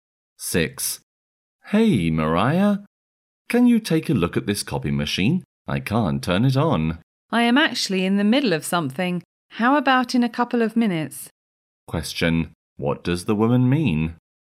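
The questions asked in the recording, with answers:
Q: what does the woman mean?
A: She is busy now but can help in a couple of minutes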